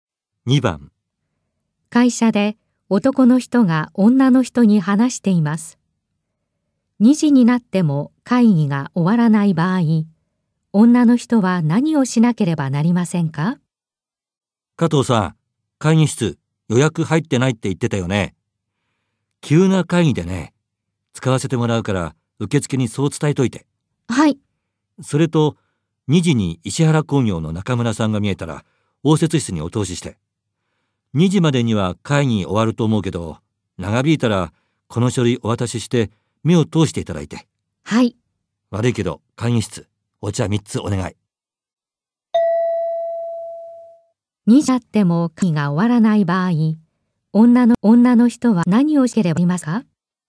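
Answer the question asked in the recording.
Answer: 中村さんに書類を渡して目を通してもらう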